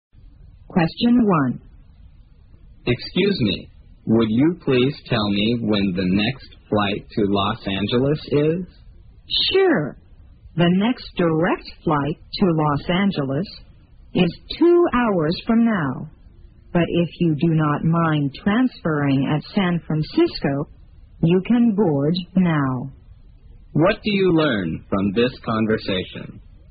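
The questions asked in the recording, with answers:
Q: What do you learn from this conversation?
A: The next direct flight is in 2 hours, but a flight via San Francisco boards now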